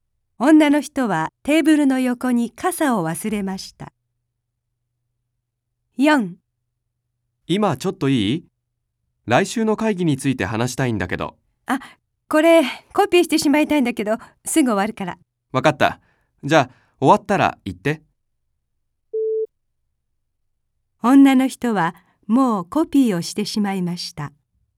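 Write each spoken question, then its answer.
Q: 女の人はもうコピーをしてしまいました。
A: 正しくない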